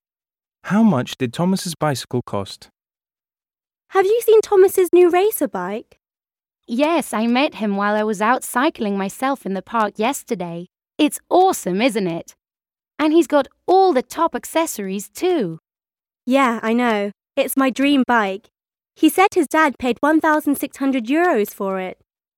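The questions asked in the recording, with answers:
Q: How much did Thomas's bicycle cost?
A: €1,600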